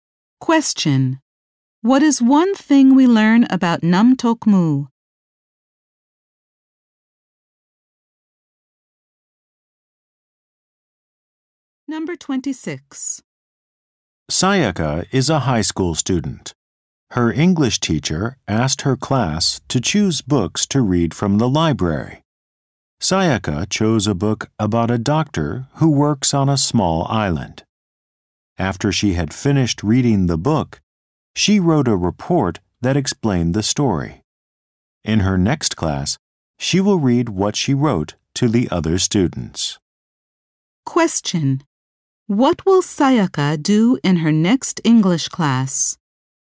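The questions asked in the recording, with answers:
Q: What will Sayaka do in her next English class?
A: Read her book report to the other students.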